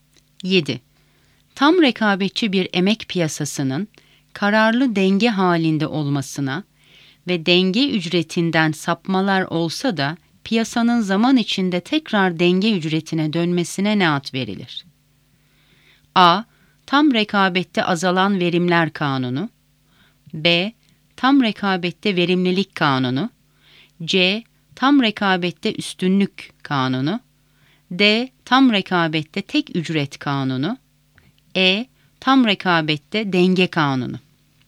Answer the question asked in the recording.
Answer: Doğru cevap D. Tam rekabette tek ücret kanunu.